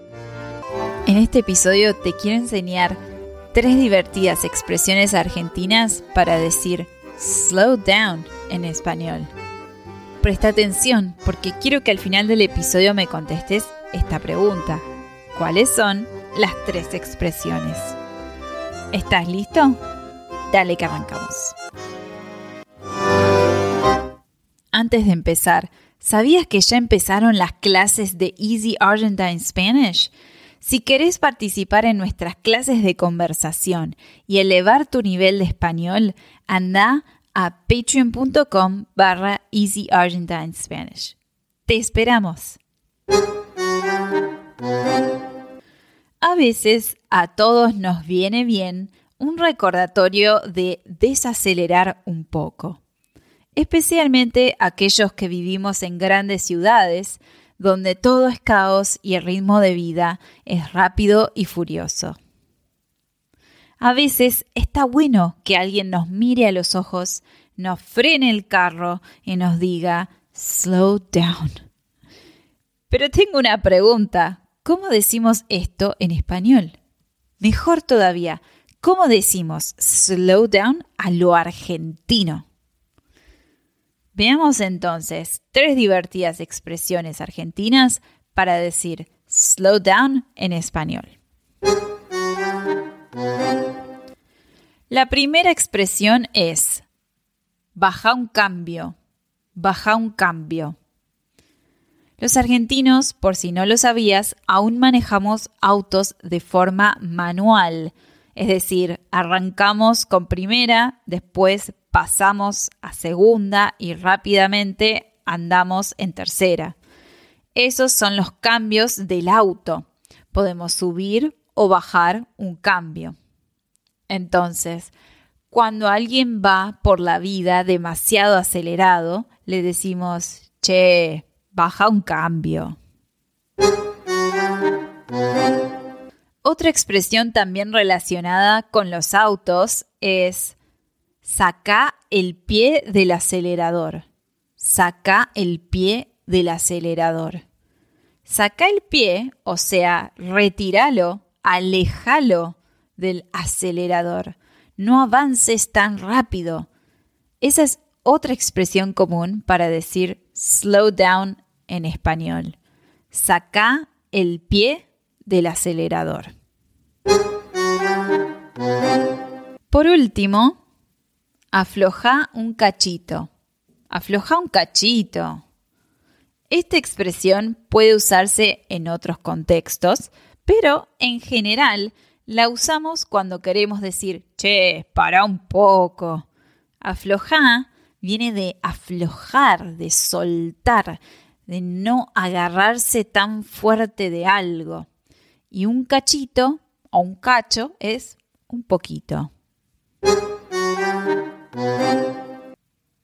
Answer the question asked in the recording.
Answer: Baja un cambio. 2. Saca el pie del acelerador. Y 3. Afloja un cachito.